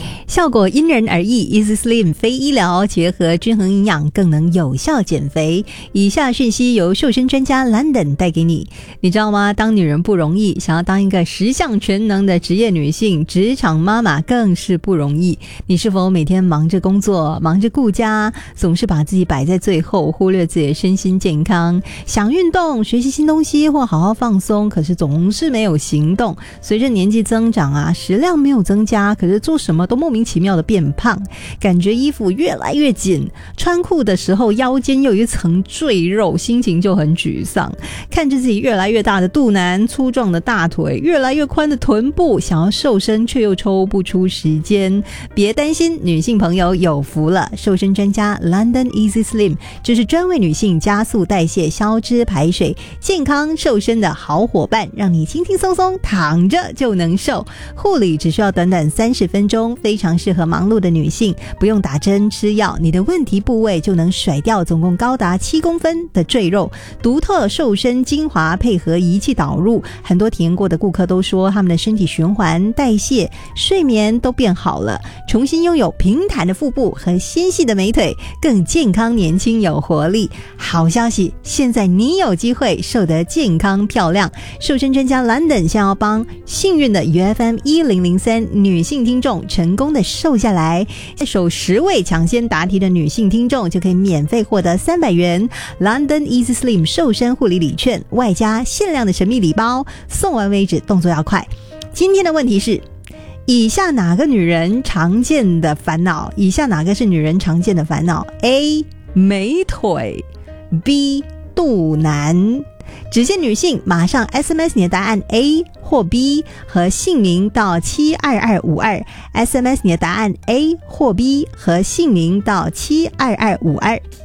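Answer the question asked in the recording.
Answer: B: 肚腩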